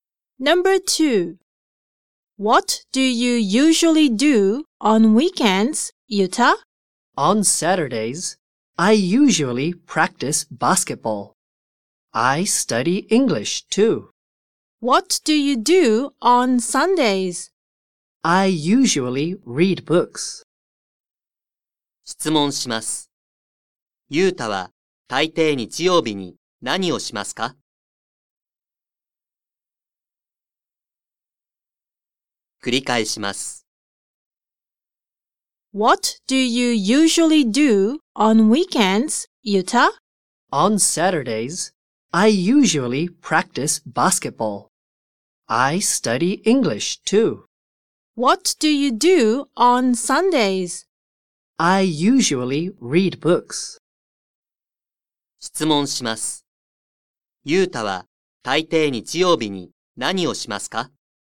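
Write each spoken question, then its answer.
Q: ユータは大抵日曜日に何をしますか?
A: 本を読む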